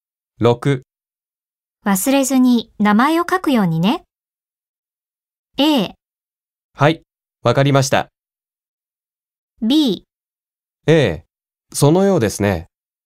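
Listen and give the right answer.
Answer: A: はい、わかりました。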